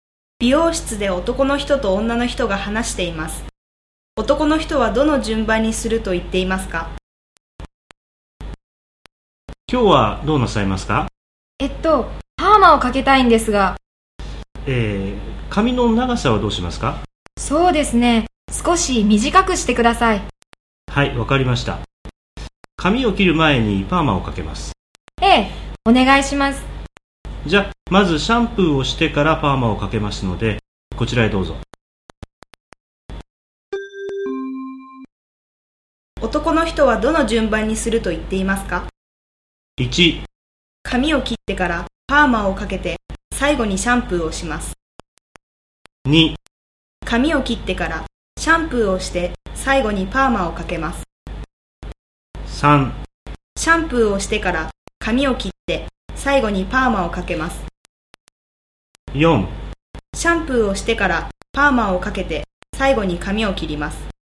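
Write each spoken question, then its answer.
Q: 男の人はどの順番にすると言っていますか?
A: 4: シャンプーをしてからパーマをかけて最後に髪を切ります。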